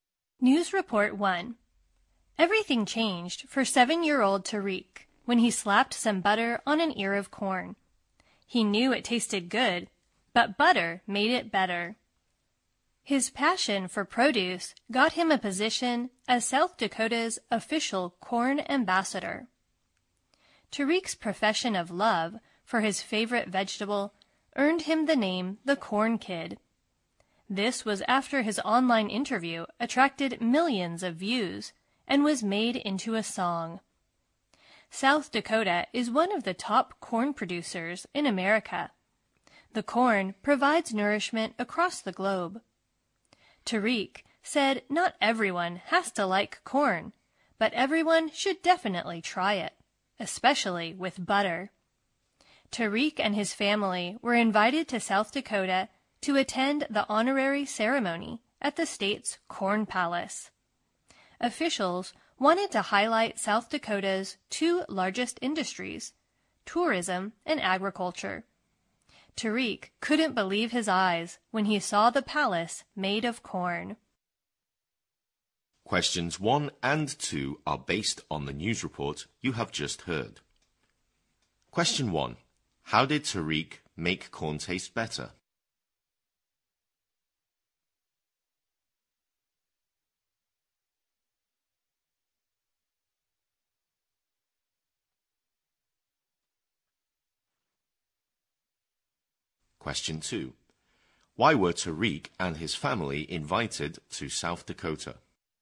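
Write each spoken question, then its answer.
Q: How did Tariq make corn taste better?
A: He put butter on it.

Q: Why were Tariq and his family invited to South Dakota?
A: To attend the ceremony naming him the state's corn ambassador, at the Corn Palace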